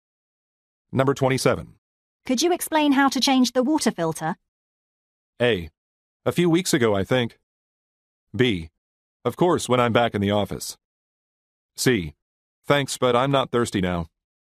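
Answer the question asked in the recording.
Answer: B: Of course, when I'm back in the office.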